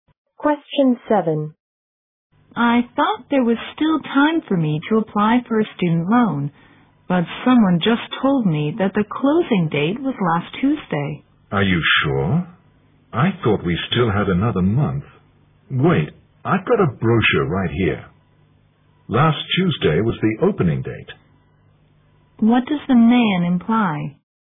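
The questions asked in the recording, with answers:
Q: What does the man imply?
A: The woman can still apply for the loan; last Tuesday was the opening date.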